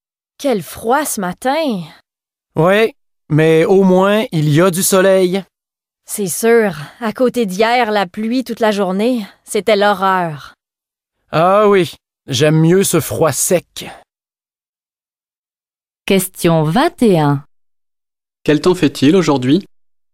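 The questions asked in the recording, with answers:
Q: Quel temps fait-il aujourd'hui?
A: Il fait froid et sec, avec du soleil.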